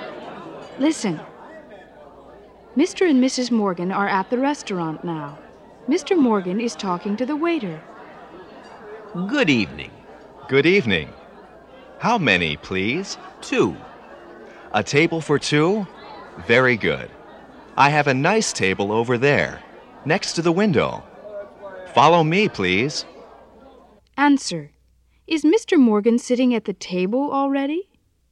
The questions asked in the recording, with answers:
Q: Is Mr. Morgan sitting at the table already?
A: No, he's not.